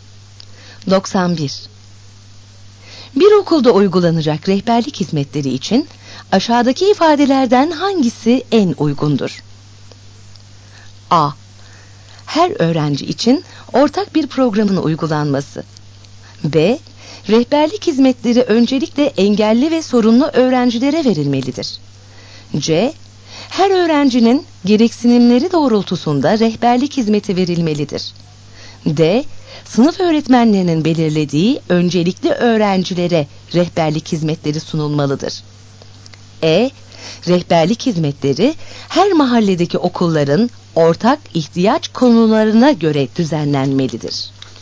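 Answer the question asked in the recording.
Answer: C: Her öğrencinin gereksinimleri doğrultusunda rehberlik hizmeti verilmelidir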